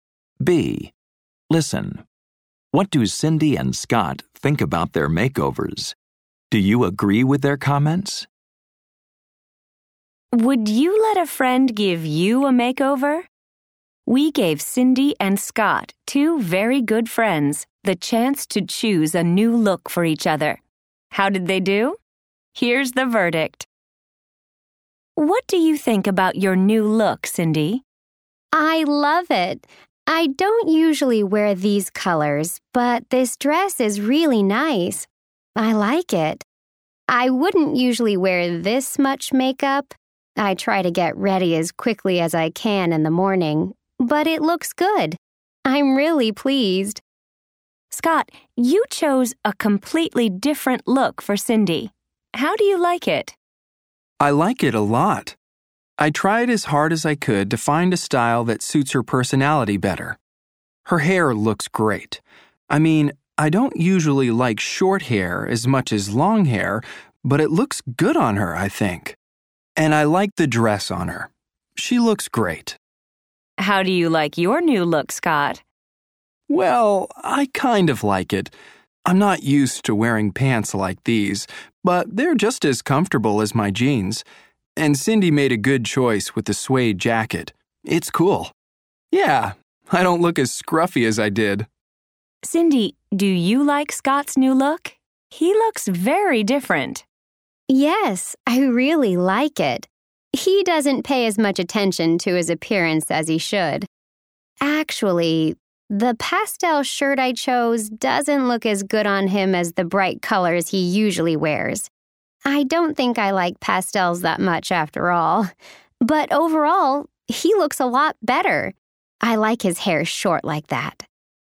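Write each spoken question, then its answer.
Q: What do Cindy and Scott think about their makeovers?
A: Overall, both like them. Cindy loves her new dress and look, though she usually wouldn't wear that much makeup. Scott likes his comfortable pants and suede jacket.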